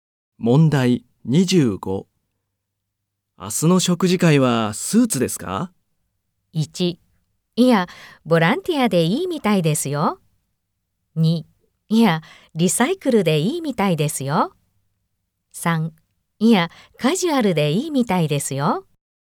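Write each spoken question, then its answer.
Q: 明日の食事会はスーツですか?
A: 1: いや、カジュアルでいいみたいですよ。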